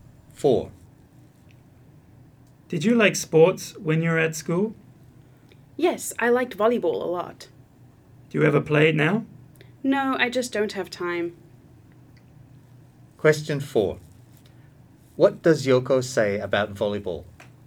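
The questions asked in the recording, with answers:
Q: What does Yoko say about volleyball?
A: She liked it a lot at school but has no time to play it now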